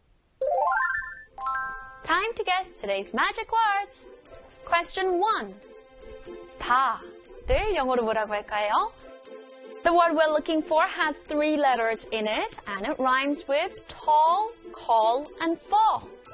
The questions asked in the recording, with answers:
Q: 다를 영어로 뭐라고 할까요?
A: 다 in English is spelled A-double-L for all.